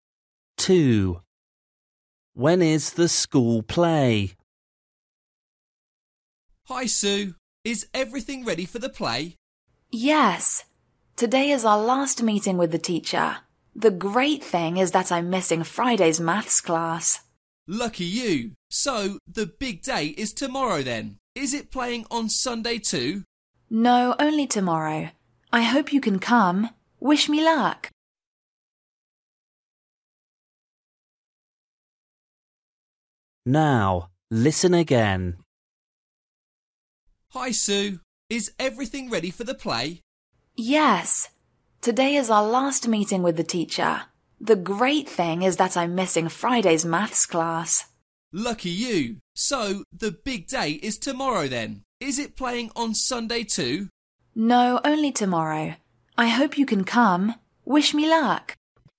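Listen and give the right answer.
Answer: Tomorrow, Friday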